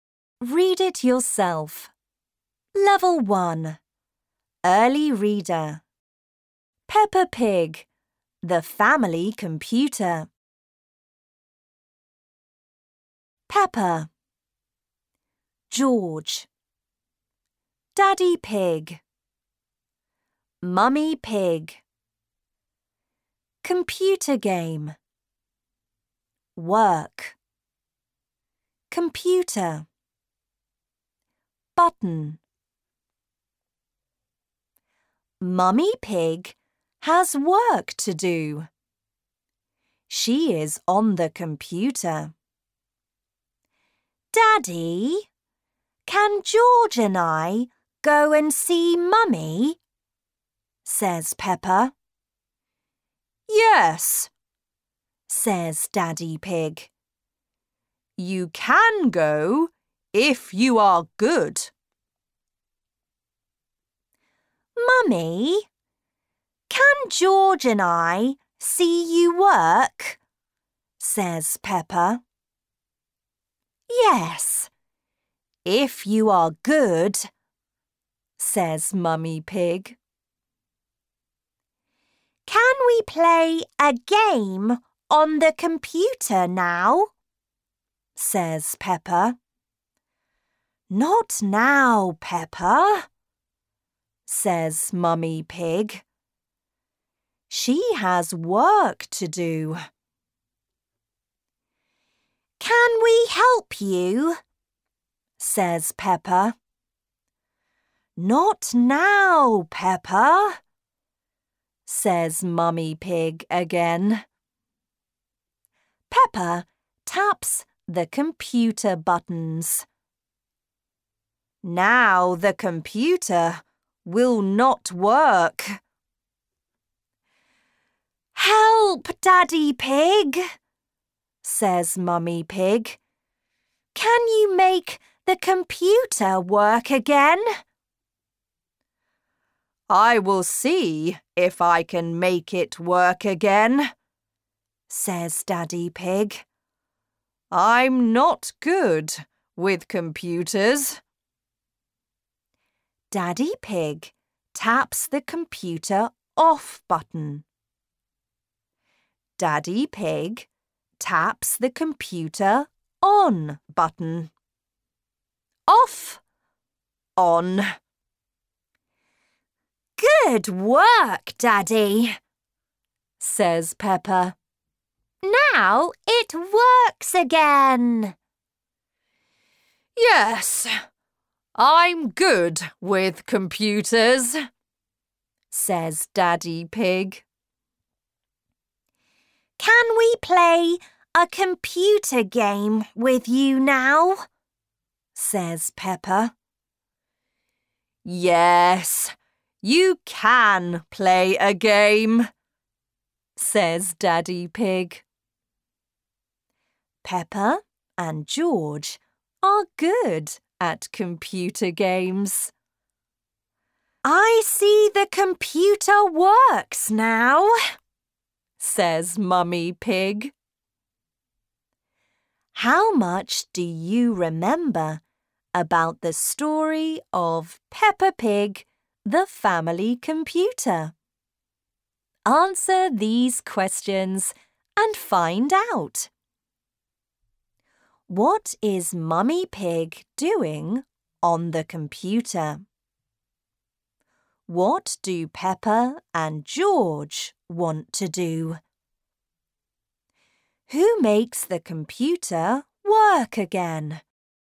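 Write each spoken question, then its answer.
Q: What is Mummy Pig doing on the computer?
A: She has work to do (she is working).

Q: What do Peppa and George want to do?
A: Play a game on the computer.

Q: Who makes the computer work again?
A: Daddy Pig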